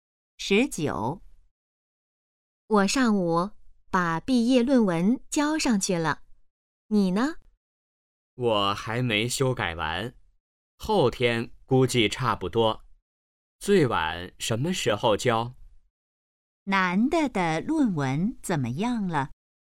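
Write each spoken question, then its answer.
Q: 男的的论文怎么样了?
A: 还没修改完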